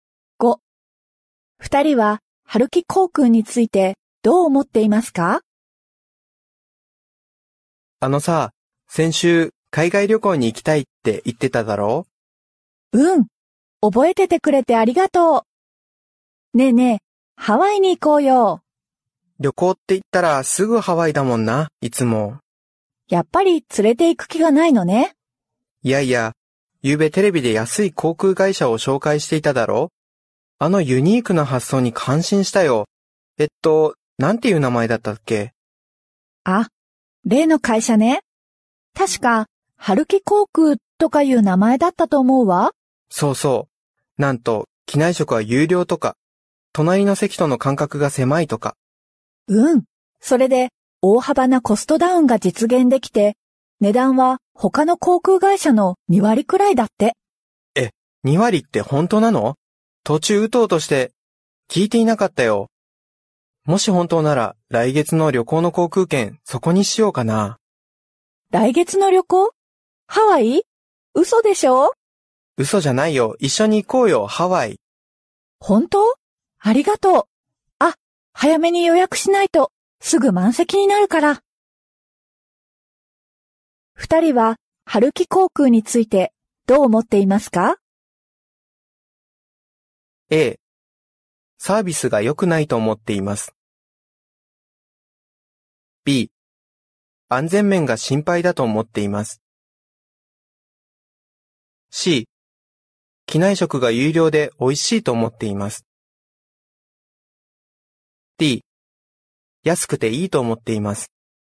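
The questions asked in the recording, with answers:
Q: 二人は春木航空についてどう思っていますか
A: D: 安くていいと思っています。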